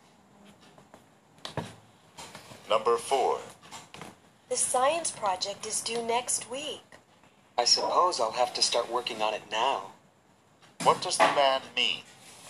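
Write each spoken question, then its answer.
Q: What does the man mean?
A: He will start the project now.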